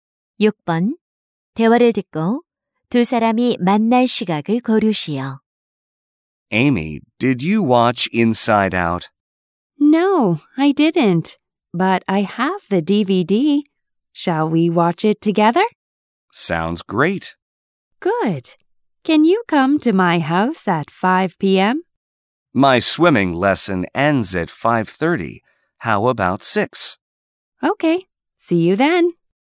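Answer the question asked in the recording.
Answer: 6시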